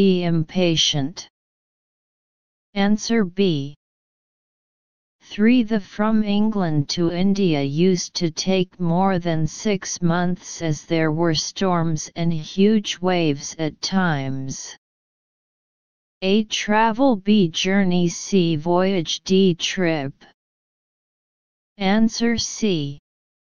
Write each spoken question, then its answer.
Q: The from England to India used to take more than 6 months as there were storms and huge waves at times.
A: Answer C.